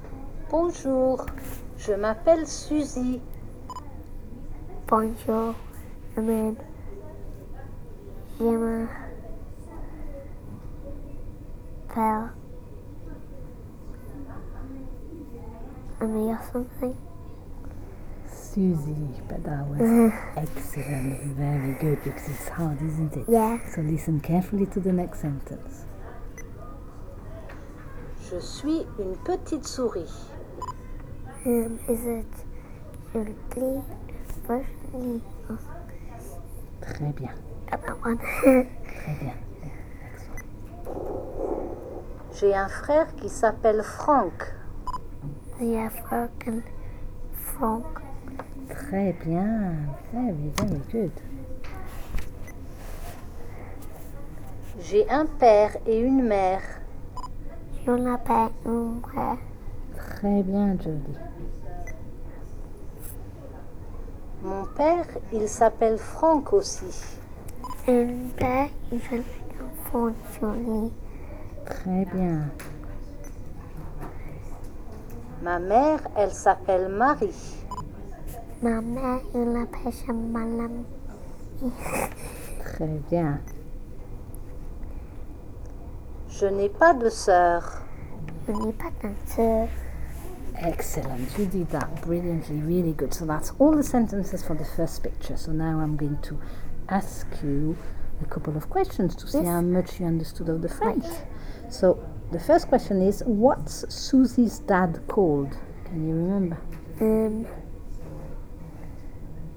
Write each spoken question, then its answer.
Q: So the first question is, what's Susie's dad called?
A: Franck.